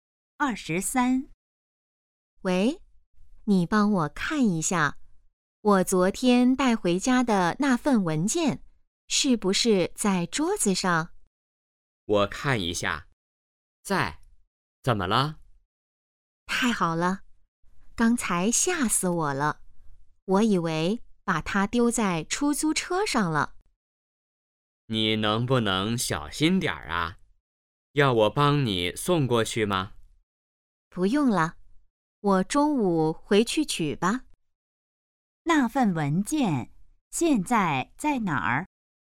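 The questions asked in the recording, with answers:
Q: 那份文件现在在哪儿?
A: 在家里桌子上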